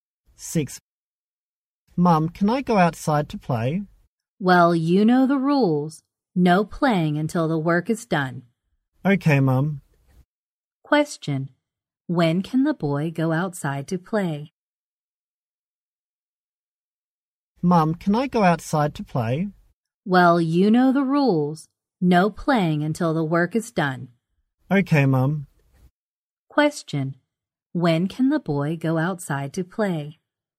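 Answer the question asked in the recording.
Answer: After he finishes his work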